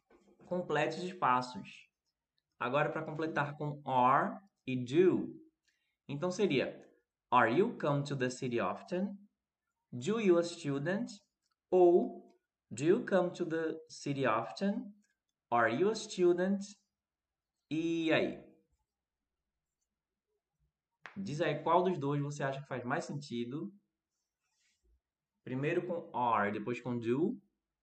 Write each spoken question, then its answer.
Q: Diz aí qual dos dois você acha que faz mais sentido.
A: Do you come to the city often?